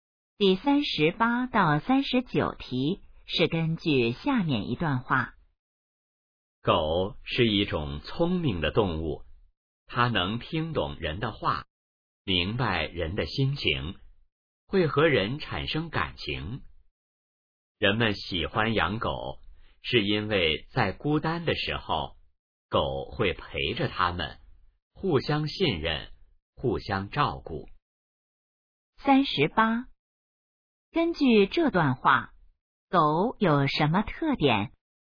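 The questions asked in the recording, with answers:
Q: 根据这段话,狗有什么特点?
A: 聪明,能听懂人的话

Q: 人们为什么喜欢狗?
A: 孤单时狗会陪着他们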